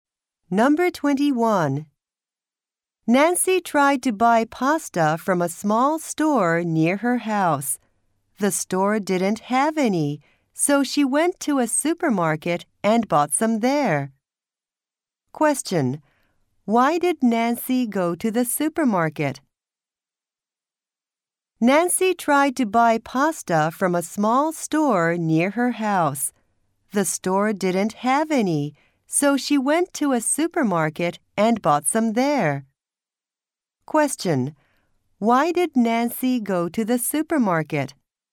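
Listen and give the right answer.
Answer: The small store didn't have any pasta.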